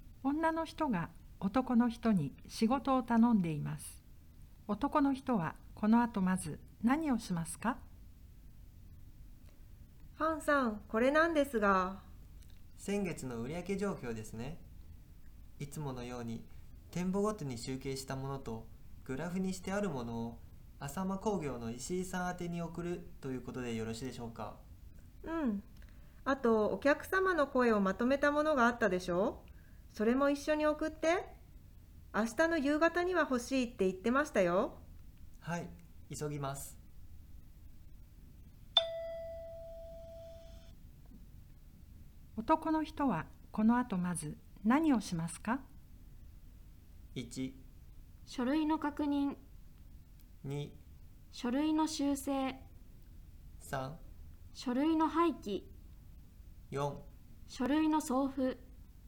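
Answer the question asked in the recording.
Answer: 4: 書類の送付。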